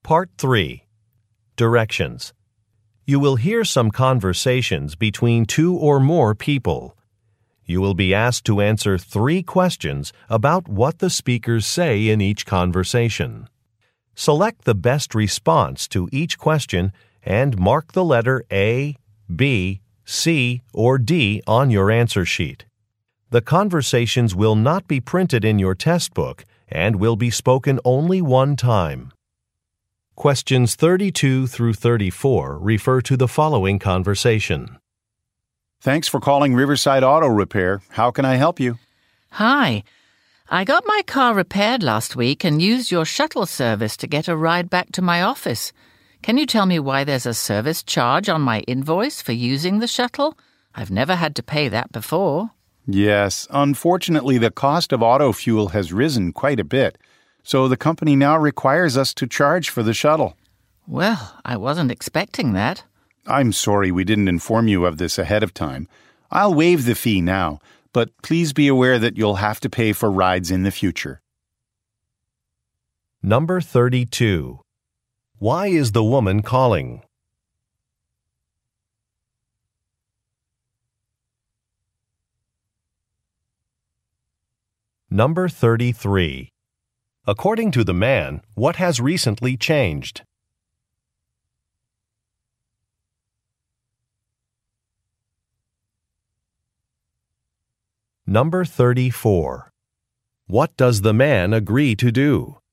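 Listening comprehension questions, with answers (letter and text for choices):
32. Why is the woman calling?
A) To make an appointment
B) To rent a car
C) To ask about a fee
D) To apply for a position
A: C) To ask about a fee

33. According to the man, what has recently changed?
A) Office hours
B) Job requirements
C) A computer system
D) A company policy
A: D) A company policy

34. What does the man agree to do?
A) Waive a fee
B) Reschedule a meeting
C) Sign a contract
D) Repair a vehicle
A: A) Waive a fee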